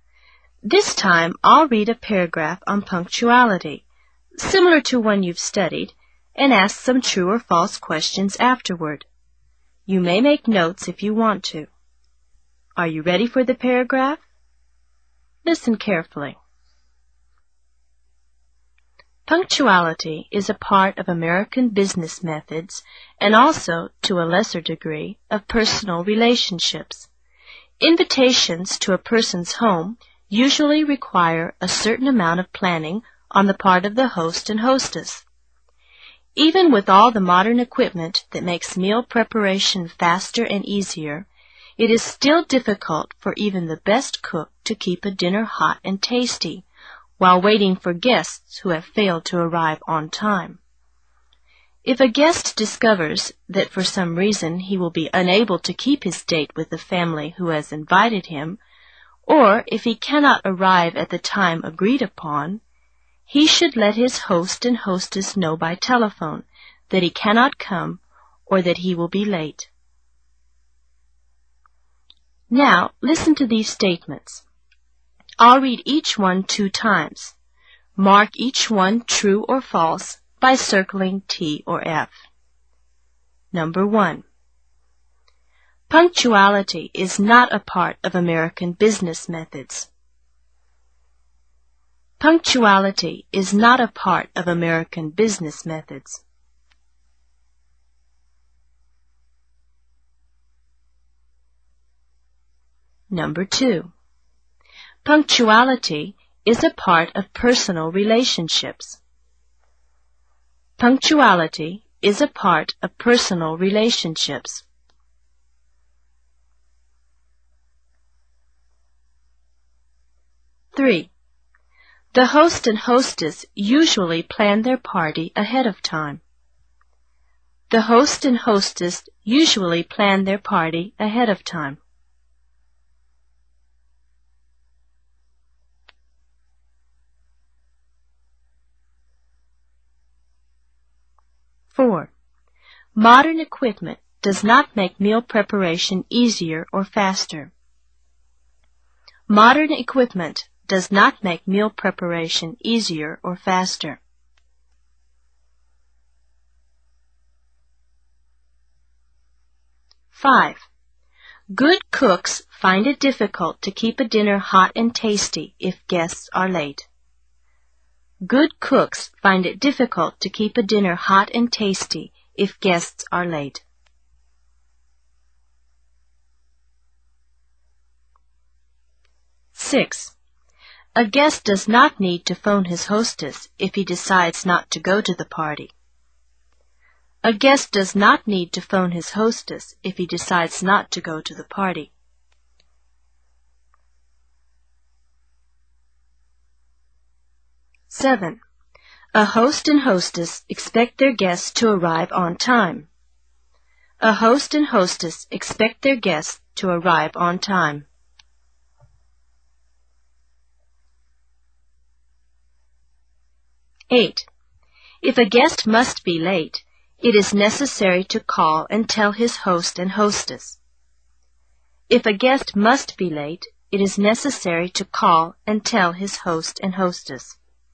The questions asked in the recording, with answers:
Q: Punctuality is not a part of American business methods.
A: you should have marked false.

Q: Punctuality is a part of personal relationships.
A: Number two is true.

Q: The host and hostess usually plan their party ahead of time.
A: This one is true.

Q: Modern equipment does not make meal preparation easier or faster.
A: I hope you marked false for this one.

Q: Good cooks find it difficult to keep a dinner hot and tasty if guests are late.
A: Number five is true.

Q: A guest does not need to phone his hostess if he decides not to go to the party.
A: Of course, this one is false.

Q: A host and hostess expect their guests to arrive on time.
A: Number seven is true.

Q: If a guest must be late, it is necessary to call and tell his host and hostess.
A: Of course, this is true.